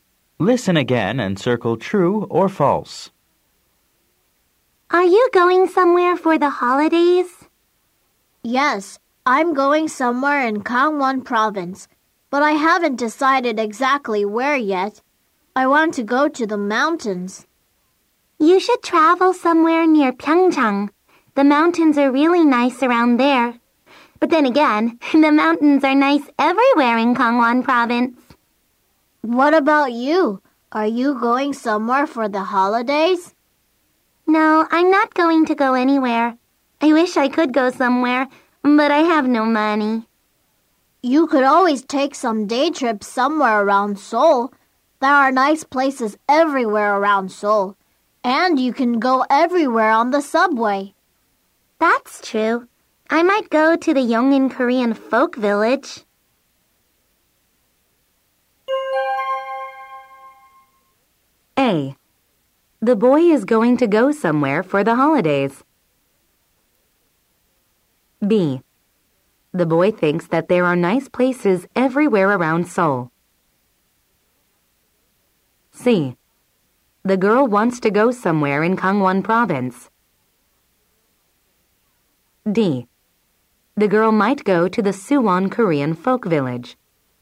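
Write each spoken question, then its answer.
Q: The girl might go to the Suwon Korean Folk Village.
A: False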